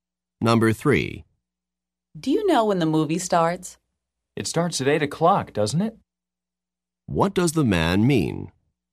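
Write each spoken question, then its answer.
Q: What does the man mean?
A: He thinks the movie starts at 8 but isn't sure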